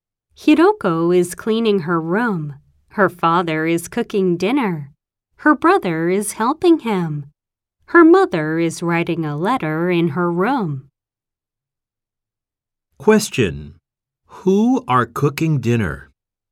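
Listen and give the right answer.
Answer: Hiroko's father and brother.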